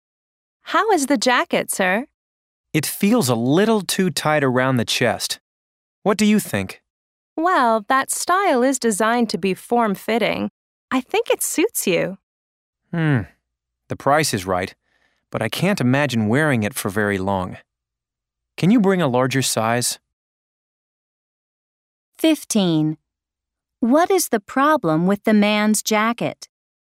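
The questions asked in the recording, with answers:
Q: What is the problem with the man's jacket?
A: It is too tight around the chest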